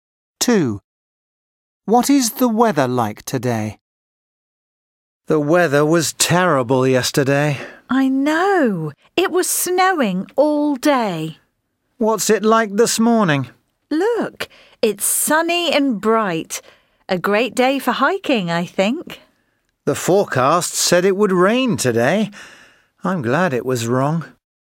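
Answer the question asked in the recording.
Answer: sunny and bright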